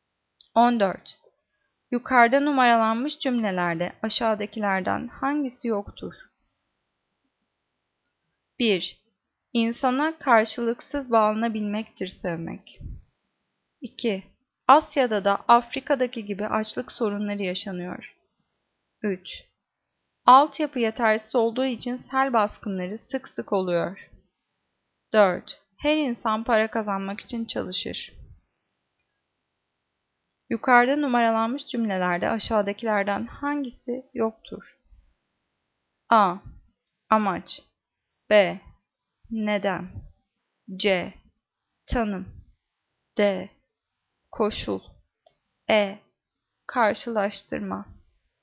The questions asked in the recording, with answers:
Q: Yukarıda numaralanmış cümlelerde aşağıdakilerden hangisi yoktur?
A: Cevap D. Koşul.